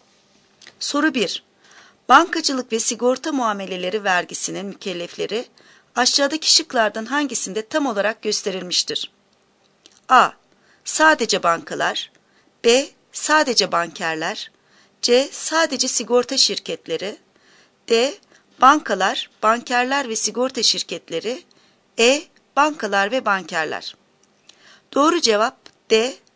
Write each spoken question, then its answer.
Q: Bankacılık ve sigorta muameleleri vergisinin mükellefleri aşağıdaki şıklardan hangisinde tam olarak gösterilmiştir?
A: Doğru cevap D.